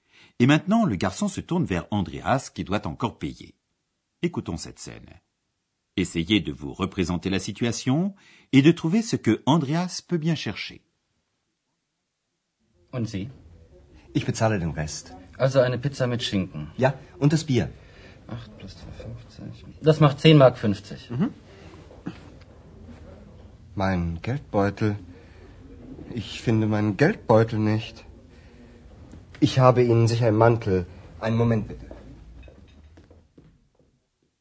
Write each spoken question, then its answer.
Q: Essayez de vous représenter la situation et de trouver ce que Andreas peut bien chercher.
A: Mais Andreas ne trouve pas son porte-monnaie.